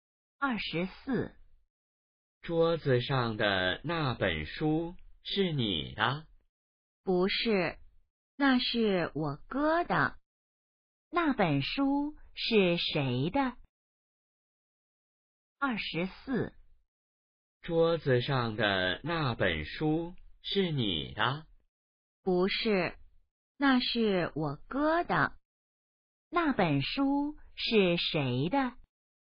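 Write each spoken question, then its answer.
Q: 那本书是谁的?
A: 哥哥的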